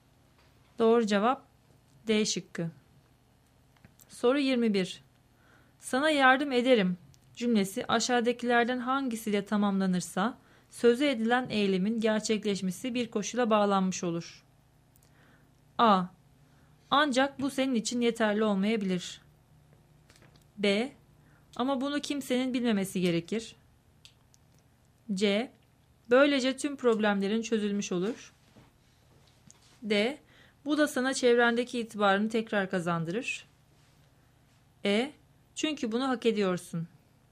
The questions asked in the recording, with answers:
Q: Sana yardım ederim cümlesi aşağıdakilerden hangisiyle tamamlanırsa sözü edilen eylemin gerçekleşmesi bir koşula bağlanmış olur.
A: Doğru cevap B şıkkı.